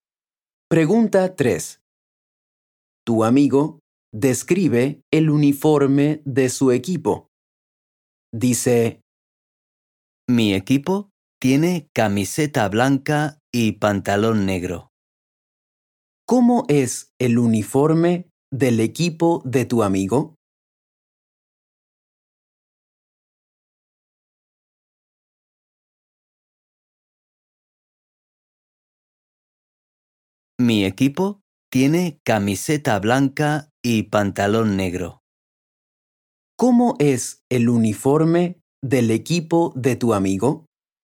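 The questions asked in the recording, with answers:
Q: ¿Cómo es el uniforme del equipo de tu amigo?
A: Camiseta blanca y pantalón negro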